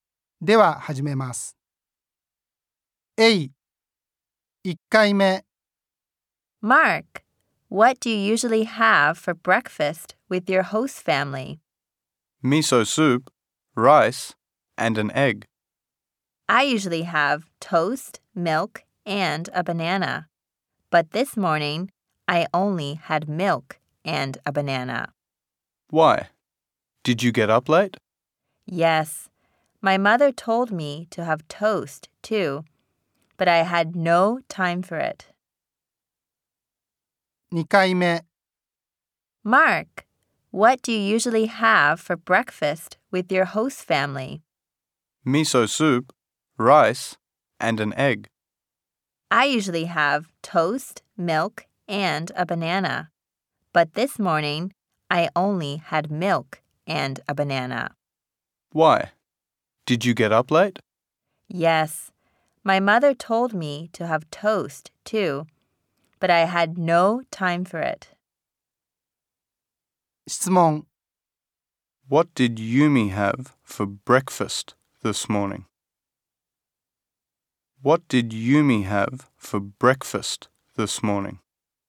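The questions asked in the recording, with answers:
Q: What did Yumi have for breakfast this morning?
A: Milk and a banana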